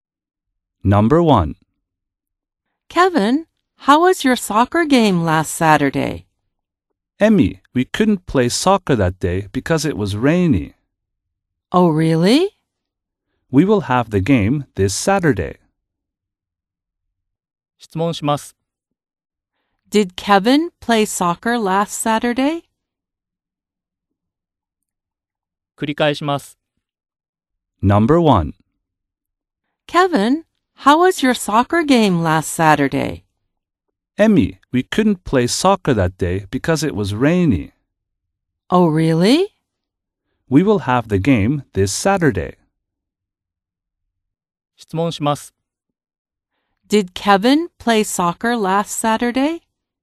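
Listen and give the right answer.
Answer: No, he didn't (it was rainy).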